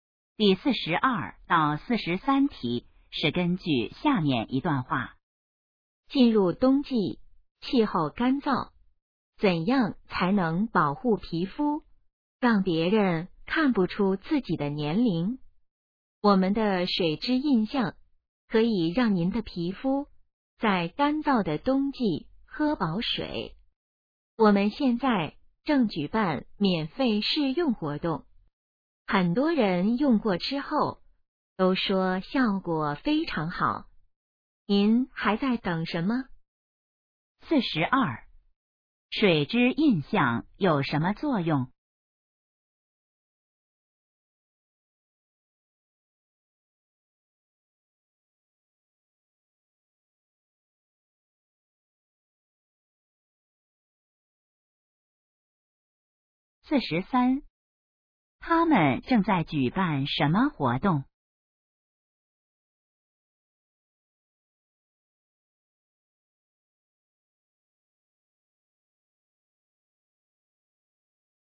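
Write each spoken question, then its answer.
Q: 水质印象有什么作用?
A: 给皮肤补水

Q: 他们正在举办什么活动?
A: 免费试用活动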